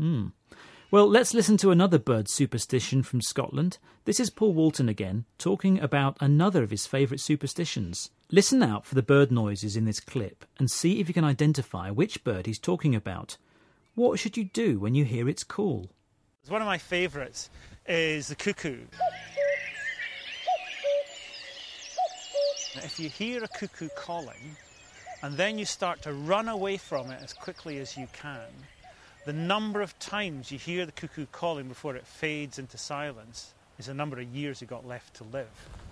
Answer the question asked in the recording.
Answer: But in Scotland, if you hear the cuckoo calling, then you should run away from it as quickly as you can.